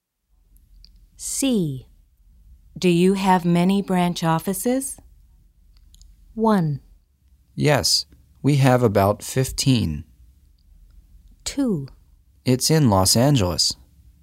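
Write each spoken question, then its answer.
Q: Do you have many branch offices?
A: 1: Yes, we have about 15.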